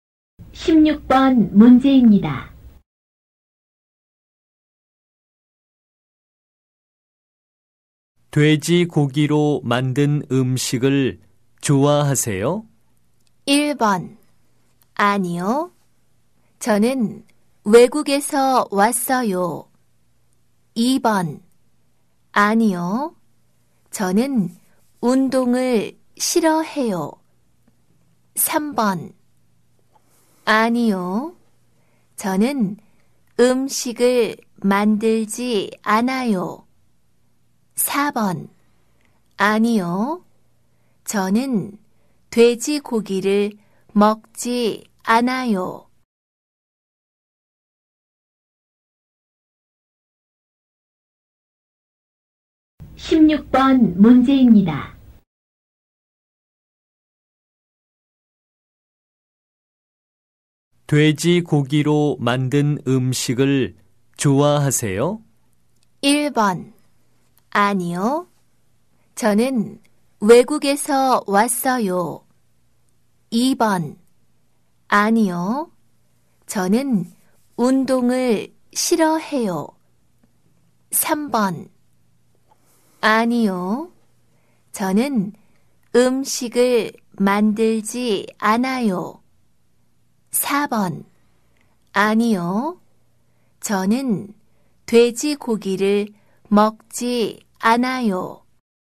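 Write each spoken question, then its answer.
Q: 돼지 고기로 만든 음식을 좋아하세요?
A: 4: 아니요. 저는 돼지고기를 먹지 않아요.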